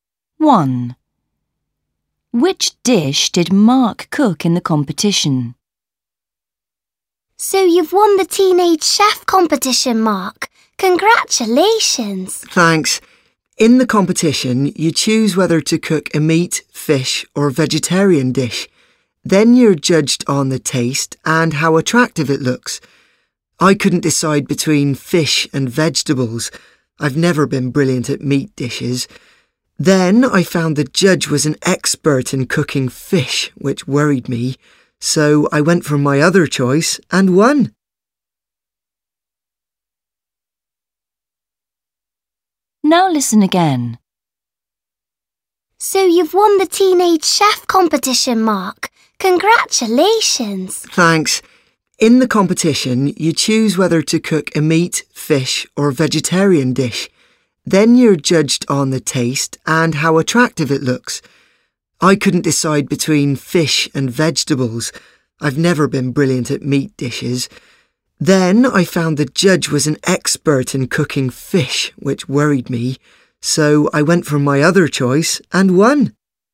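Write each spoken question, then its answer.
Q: Which dish did Mark cook in the competition?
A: A vegetarian dish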